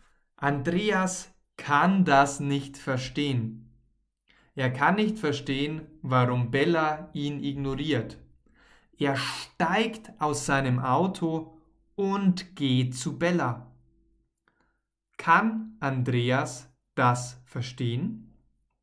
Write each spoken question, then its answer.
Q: Kann Andreas das verstehen?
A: Nein, er kann das nicht verstehen.